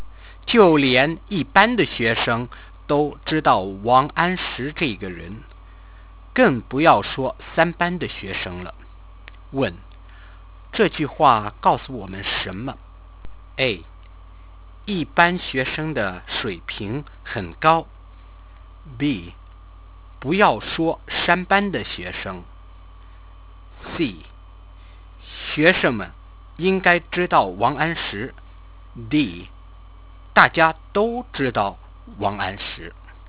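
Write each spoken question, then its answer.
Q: 问,这句话告诉我们什么?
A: D. 大家都知道王安石。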